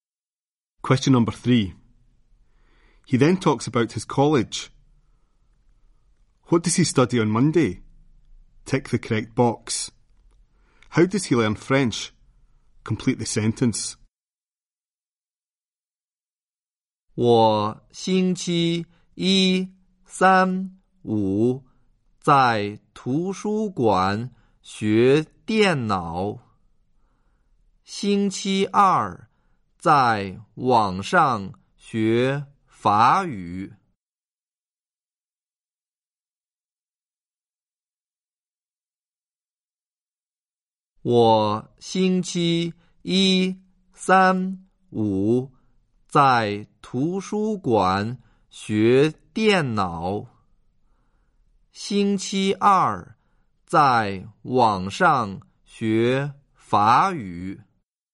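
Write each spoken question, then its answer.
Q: What does he study on Monday?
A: Computing

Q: How does he learn French?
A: Online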